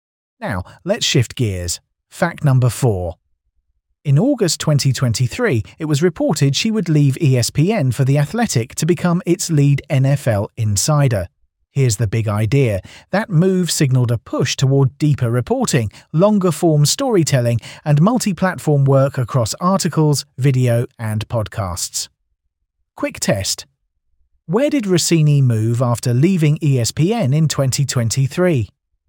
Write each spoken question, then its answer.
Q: Where did Rossini move after leaving ESPN in 2023?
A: Correct answer. The Athletic.